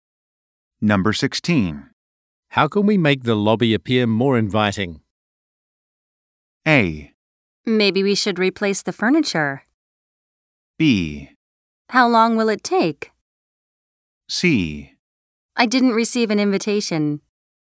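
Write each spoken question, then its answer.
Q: How can we make the lobby appear more inviting?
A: A: Maybe we should replace the furniture.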